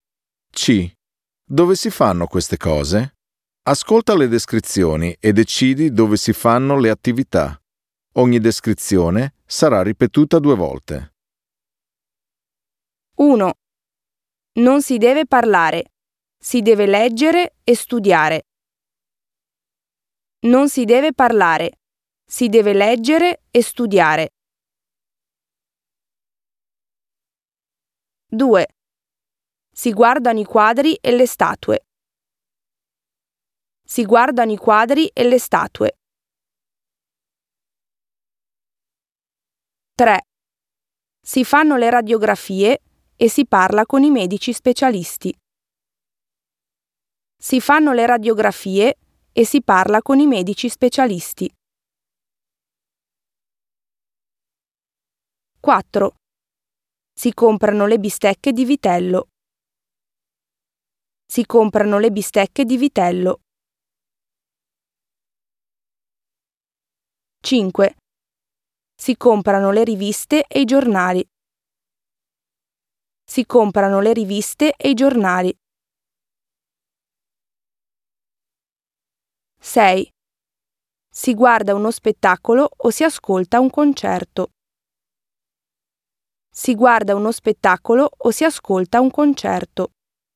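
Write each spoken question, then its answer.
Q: Non si deve parlare. Si deve leggere e studiare.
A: in biblioteca

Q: Si guardano i quadri e le statue.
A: al museo

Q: Si fanno le radiografie e si parla con i medici specialisti.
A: in ospedale

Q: Si comprano le bistecche di vitello.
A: in macelleria

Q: Si comprano le riviste e i giornali.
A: in edicola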